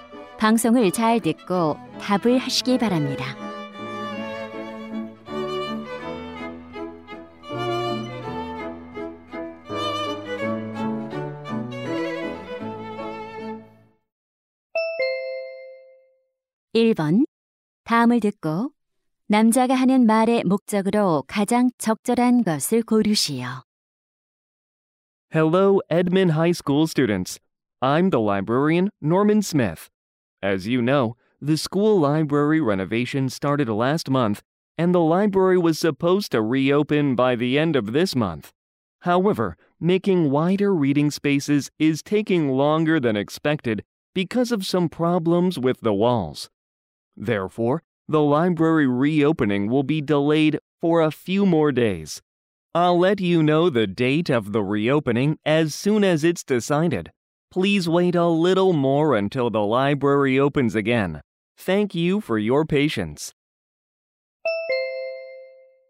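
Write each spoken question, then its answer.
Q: 다음을 듣고 남자가 하는 말의 목적으로 가장 적절한 것을 고르시오.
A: 도서관 재개관이 며칠 더 늦어짐을 알리려고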